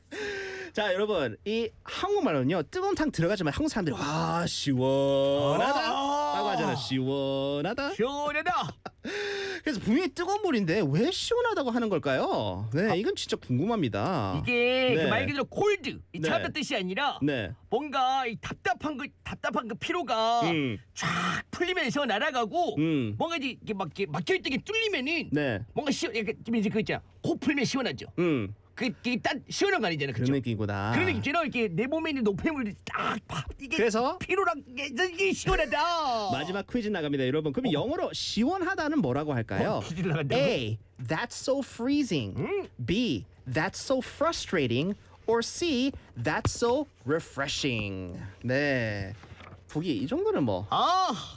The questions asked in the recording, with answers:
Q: 마지막 퀴즈 나갑니다 여러분 그럼 영어로 시원하다는 뭐라고 할까요?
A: 정답 바로 C. Refreshing.